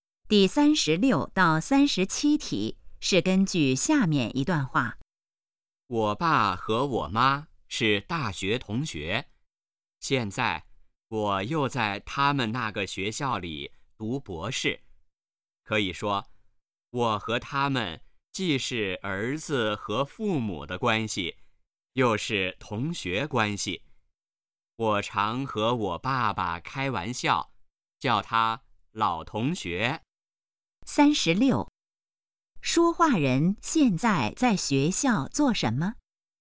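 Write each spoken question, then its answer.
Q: 说话人现在在学校做什么?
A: 读博士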